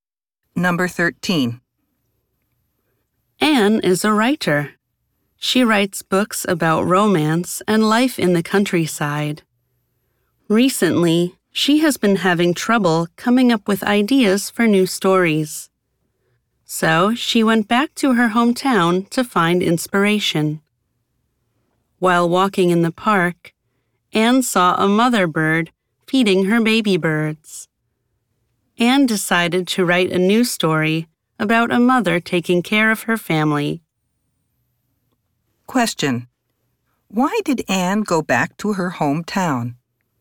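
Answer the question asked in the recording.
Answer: To find inspiration for new stories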